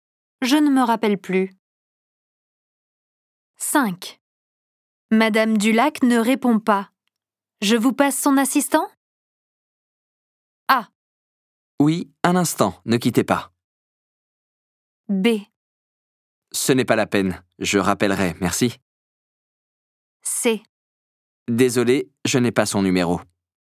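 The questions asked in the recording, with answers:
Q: Madame Dulac ne répond pas. Je vous passe son assistant?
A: B: Ce n'est pas la peine, je rappellerai, merci.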